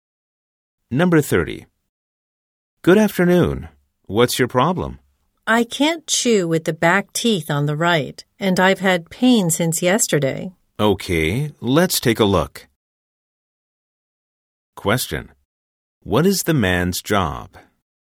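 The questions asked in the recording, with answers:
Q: What is the man's job?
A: A dentist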